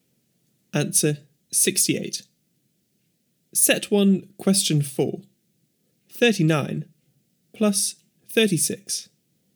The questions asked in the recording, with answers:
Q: 39 plus 36.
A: Answer 75.